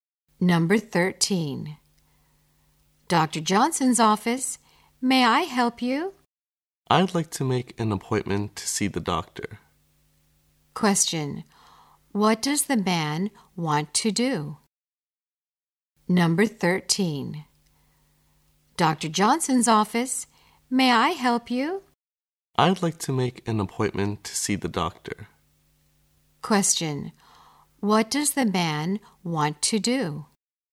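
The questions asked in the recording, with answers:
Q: what does the man want to do?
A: Make an appointment to see the doctor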